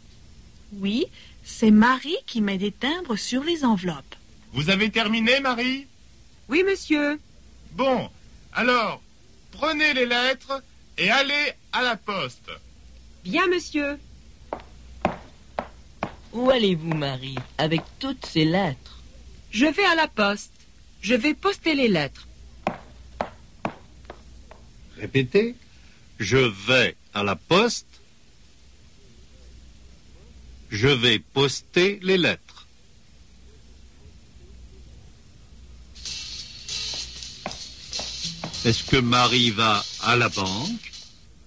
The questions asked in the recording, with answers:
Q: Est-ce que Marie va à la banque?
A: Non, elle ne va pas à la banque.